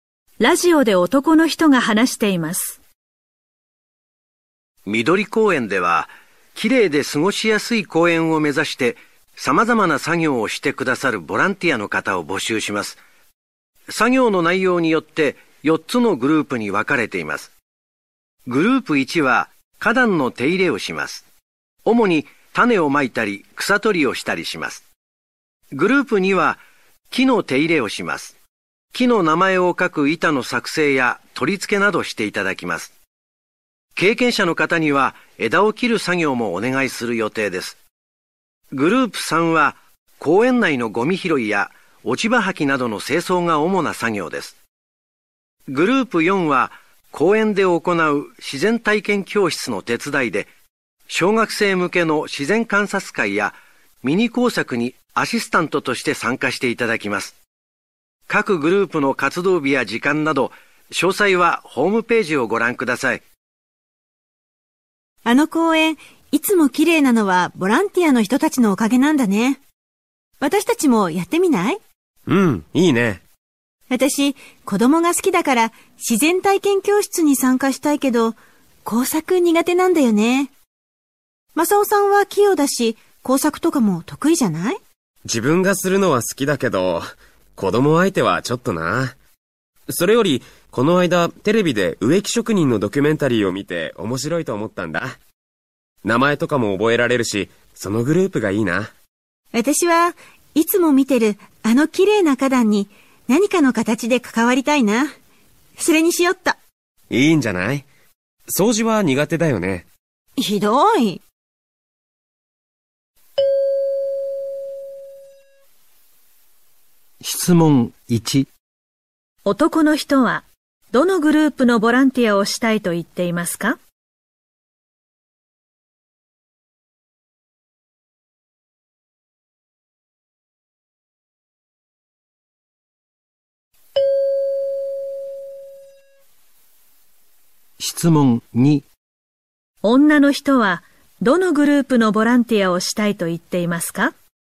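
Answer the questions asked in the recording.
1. グループ2
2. グループ1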